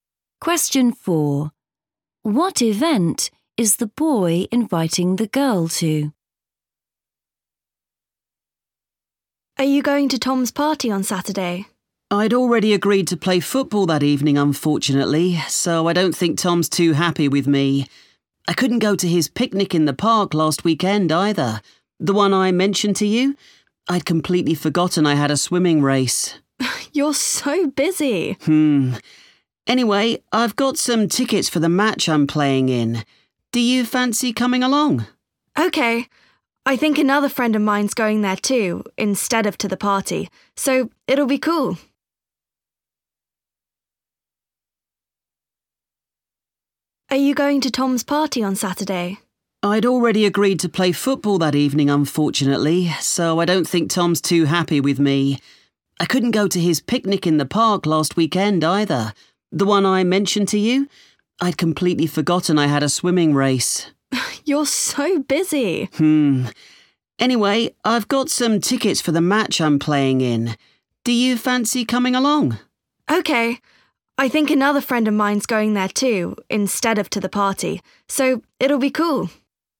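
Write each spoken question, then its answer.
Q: What event is the boy inviting the girl to?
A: a football match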